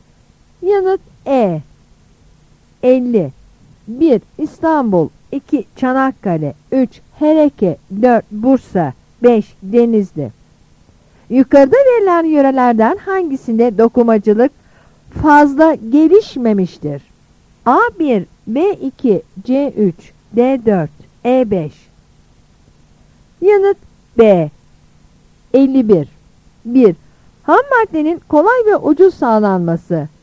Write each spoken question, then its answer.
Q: Yukarıda verilen yörelerden hangisinde dokumacılık fazla gelişmemiştir?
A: Yanıt B.